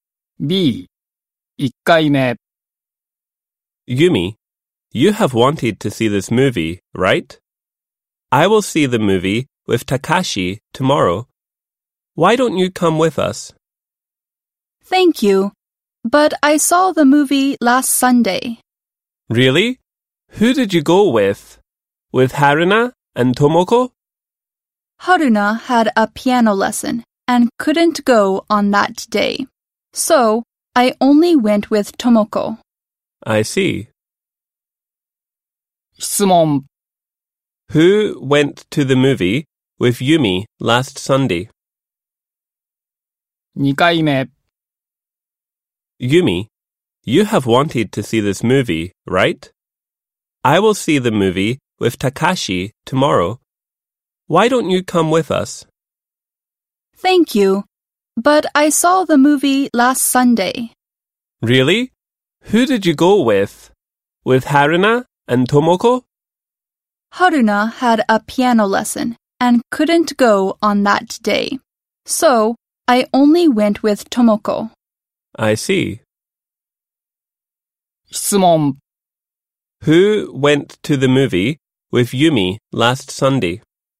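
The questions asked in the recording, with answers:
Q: Who went to the movie with Yumi last Sunday?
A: Tomoko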